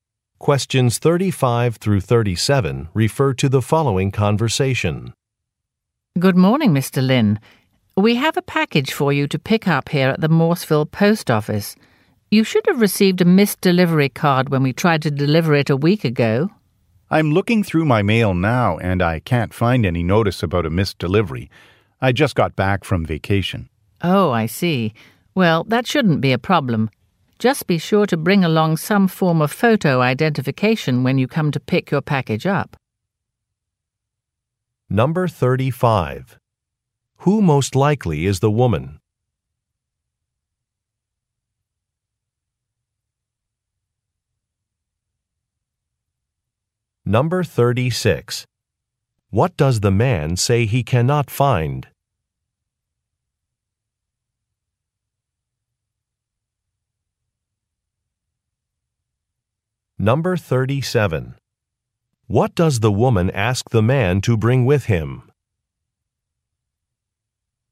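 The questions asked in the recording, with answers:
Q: Who most likely is the woman?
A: A post office worker

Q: What does the man say he cannot find?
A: A missed delivery notice

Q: What does the woman ask the man to bring with him?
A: Photo identification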